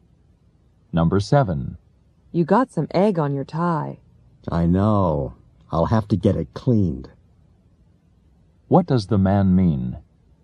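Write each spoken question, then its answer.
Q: What does the man mean?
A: He will have his tie cleaned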